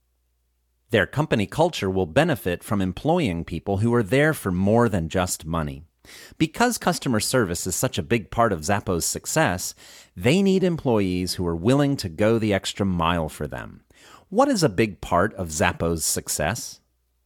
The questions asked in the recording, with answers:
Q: What is a big part of Zappos' success?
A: Customer service is a big part of Zappos' success.